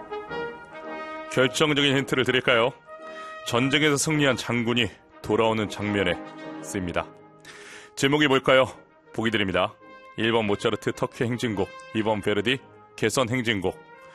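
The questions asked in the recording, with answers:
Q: 제목이 뭘까요?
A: 2번: 베르디 개선 행진곡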